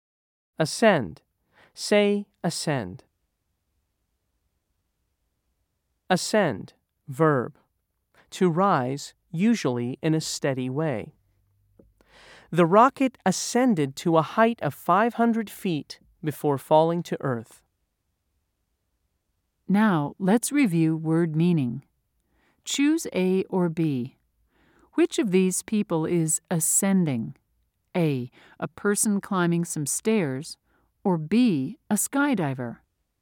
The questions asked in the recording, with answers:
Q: Choose A or B. Which of these people is ascending?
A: If you said A, you were right.